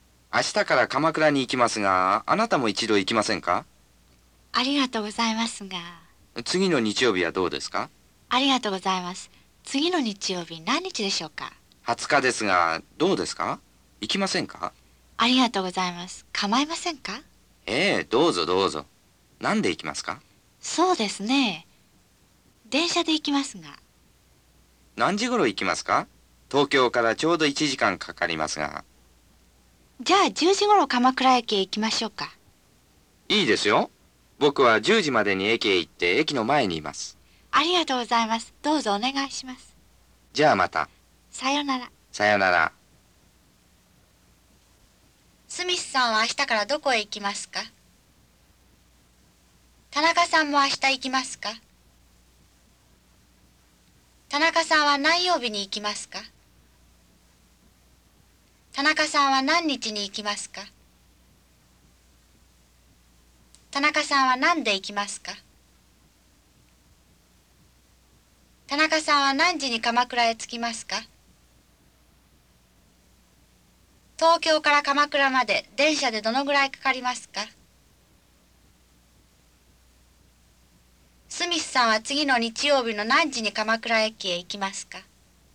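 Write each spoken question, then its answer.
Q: スミスさんは明日からどこへ行きますか?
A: 鎌倉

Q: 田中さんも明日行きますか?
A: いいえ、行きません

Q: 田中さんは何曜日に行きますか?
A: 日曜日

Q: 田中さんは何日に行きますか?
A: 20日

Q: 田中さんは何で行きますか?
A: 電車

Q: 田中さんは何時に鎌倉へ着きますか?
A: 10時頃

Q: 東京から鎌倉まで電車でどのぐらいかかりますか?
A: 1時間

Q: スミスさんは次の日曜日の何時に鎌倉駅へ行きますか?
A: 10時まで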